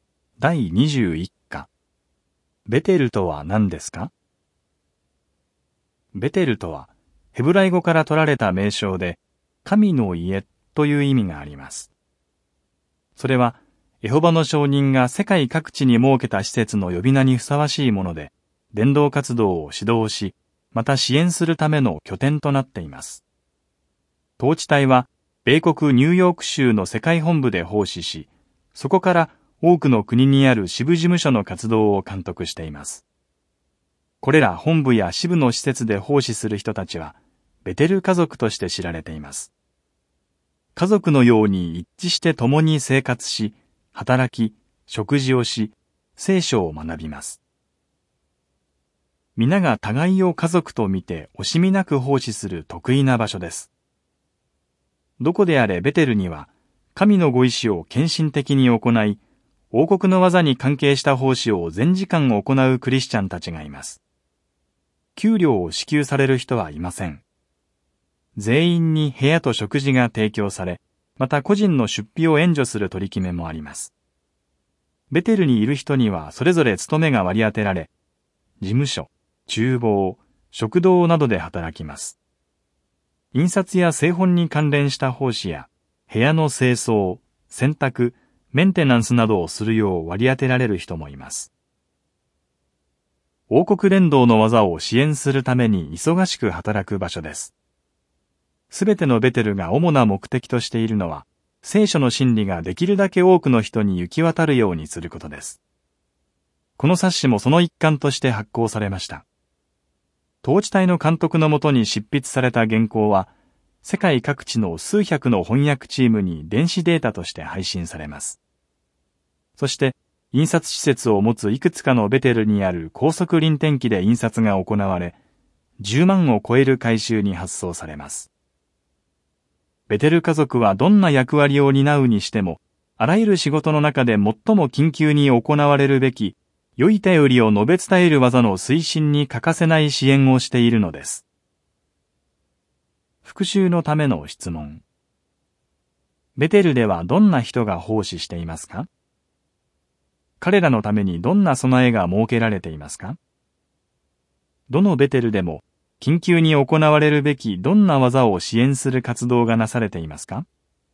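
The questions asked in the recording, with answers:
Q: ベテルではどんな人が奉仕していますか?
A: 神のご意志を献身的に行い、王国の業に関係した奉仕を全時間行うクリスチャンたち

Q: 彼らのためにどんな備えが設けられていますか?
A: 部屋と食事が提供され、個人の出費を援助する取り決めもある

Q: どのベテルでも緊急に行われるべきどんな技を支援する活動がなされていますか?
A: 良い便りを述べ伝える業(王国伝道の業)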